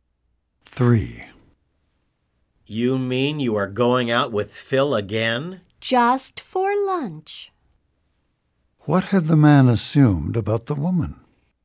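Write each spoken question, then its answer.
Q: What had the man assumed about the woman?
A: That she was no longer going out with Phil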